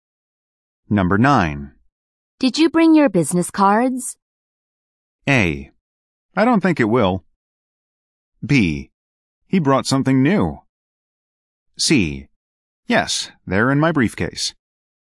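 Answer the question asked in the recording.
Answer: C: Yes, they're in my briefcase.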